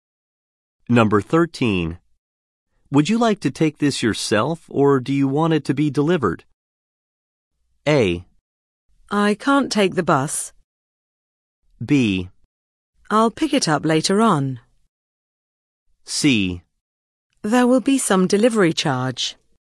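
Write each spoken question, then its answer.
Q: Would you like to take this yourself or do you want it to be delivered?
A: B: I'll pick it up later on.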